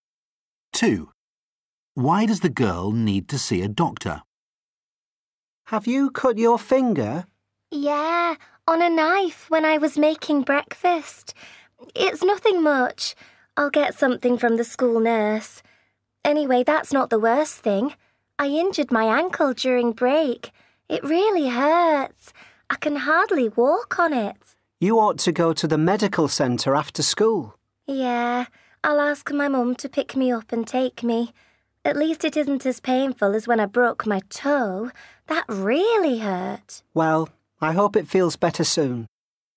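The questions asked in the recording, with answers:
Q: Why does the girl need to see a doctor?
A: She injured her ankle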